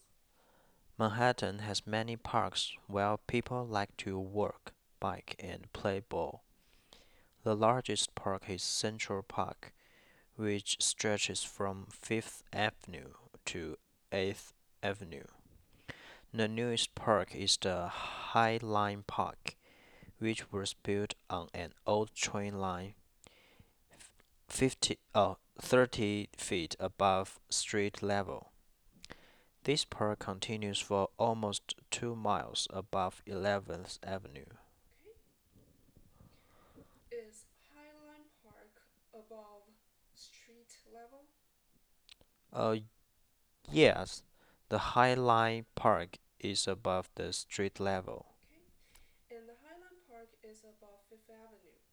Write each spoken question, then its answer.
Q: And the High Line Park is above 5th Avenue, right?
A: No, the High Line Park is on the 11th Avenue.